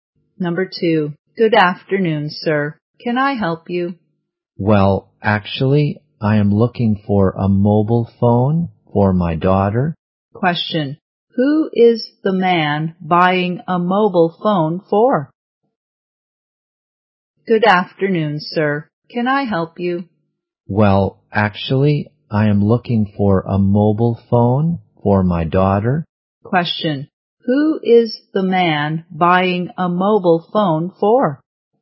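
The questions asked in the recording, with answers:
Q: Question. Who is the man buying a mobile phone for?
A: His daughter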